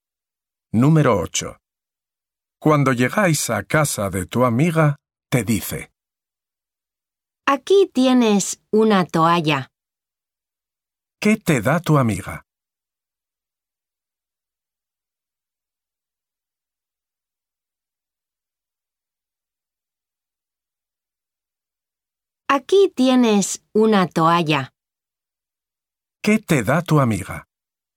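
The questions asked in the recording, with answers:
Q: ¿Qué te da tu amiga?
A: Una toalla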